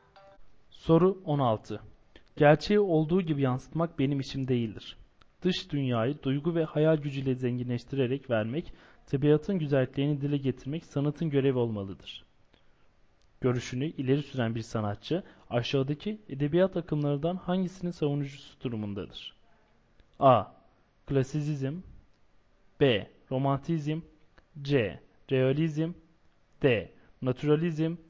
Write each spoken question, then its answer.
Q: Görüşünü ileri süren bir sanatçı, aşağıdaki edebiyat akımlarından hangisinin savunucusu durumundadır?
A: Doğru yanıt D şıkkı.